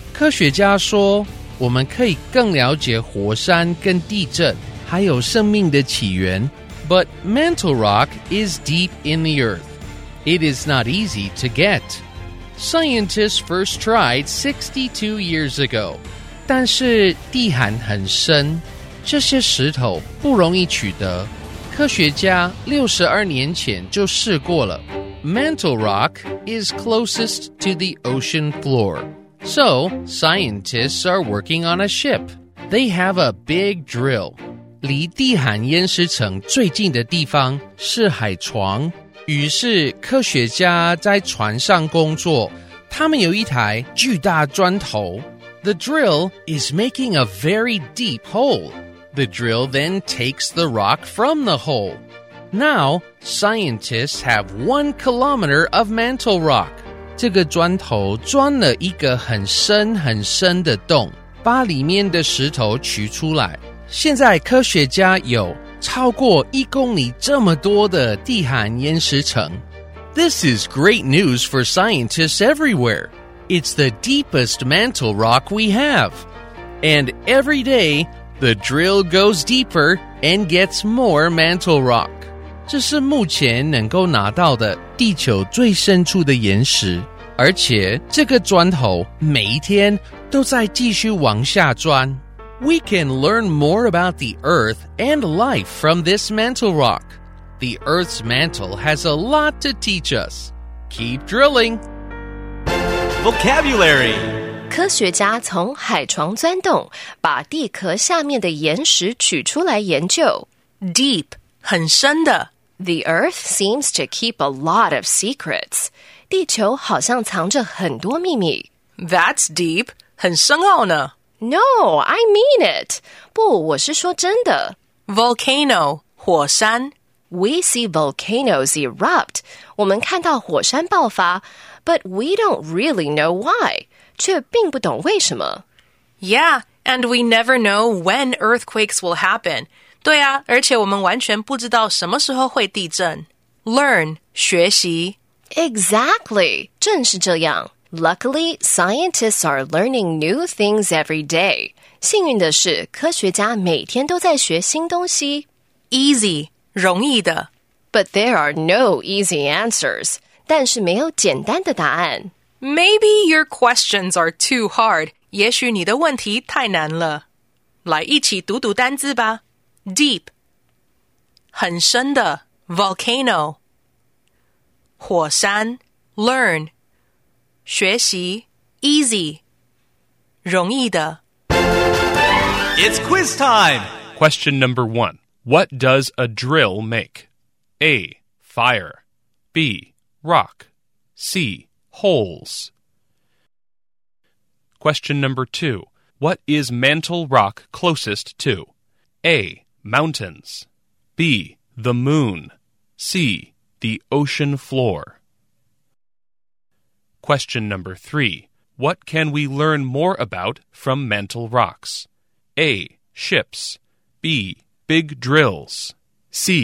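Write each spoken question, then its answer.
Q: What does a drill make?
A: C: Holes.

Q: What is mantle rock closest to?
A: C: The ocean floor.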